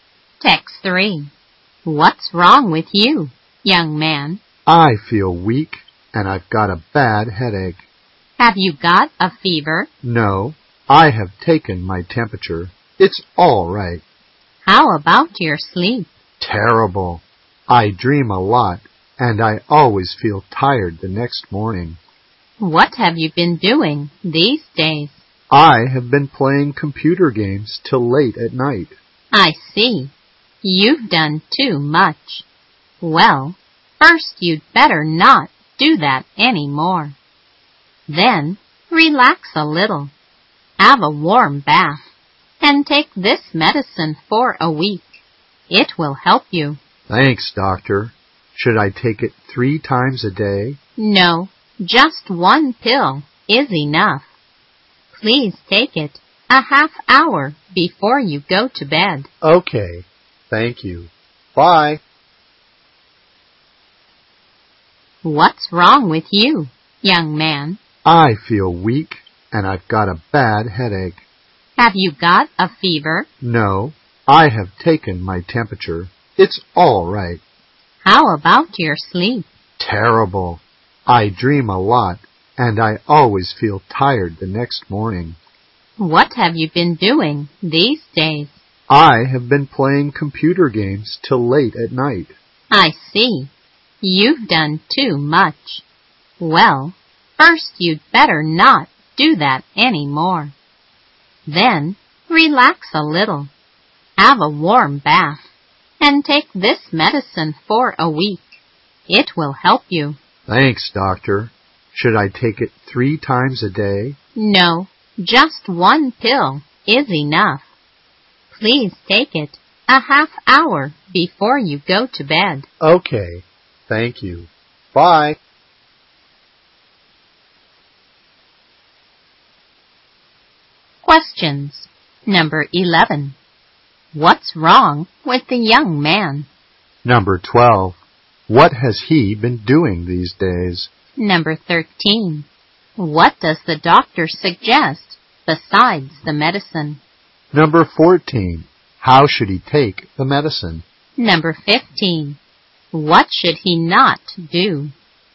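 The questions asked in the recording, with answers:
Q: Number 11. What's wrong with the young man?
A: He feels weak and has a bad headache

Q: Number 12. What has he been doing these days?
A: Playing computer games till late at night

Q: Number 13. What does the doctor suggest besides the medicine?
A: Stop playing games late, relax and have a warm bath

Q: Number 14. How should he take the medicine?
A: One pill half an hour before bed

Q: Number 15. What should he not do?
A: Play computer games late at night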